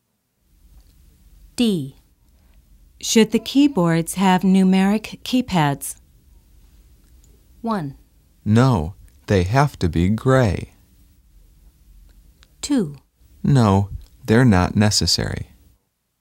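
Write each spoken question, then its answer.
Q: Should the keyboards have numeric keypads?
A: 2: No, they're not necessary.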